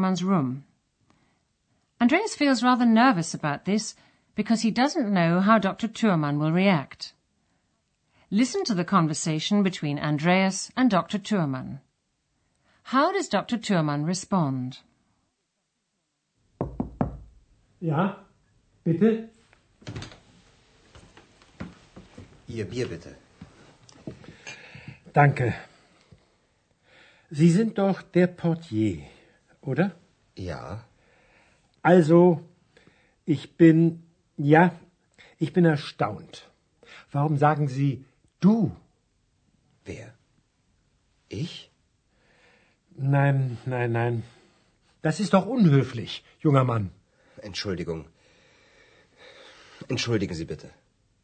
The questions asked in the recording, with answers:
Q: How does Dr. Thurmann respond?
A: He's surprised that Andreas has called him du, and he asks him why he's done so.